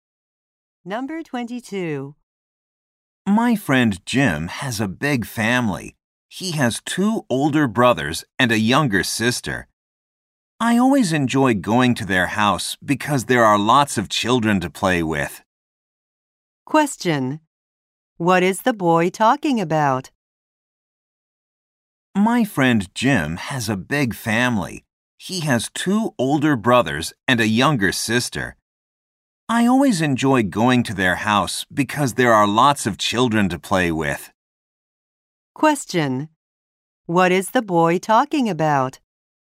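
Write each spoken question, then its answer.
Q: What is the boy talking about?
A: His friend Jim's family.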